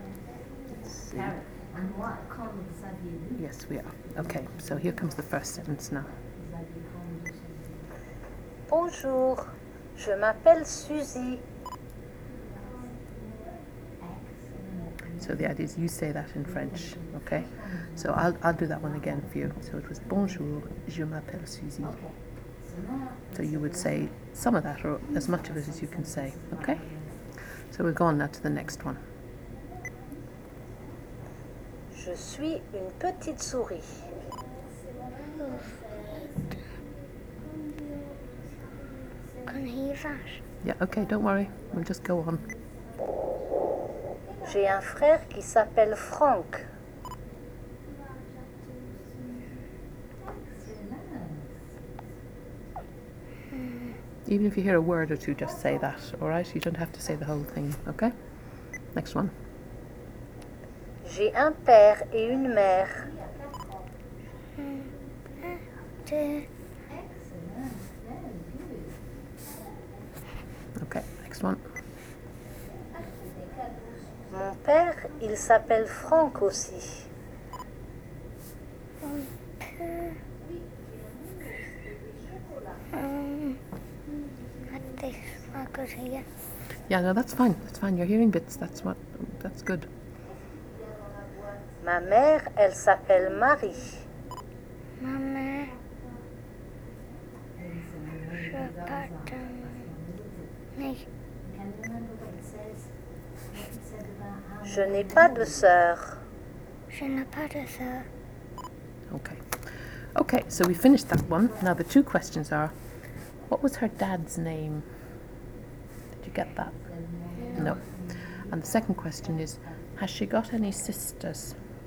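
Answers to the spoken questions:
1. Franck
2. No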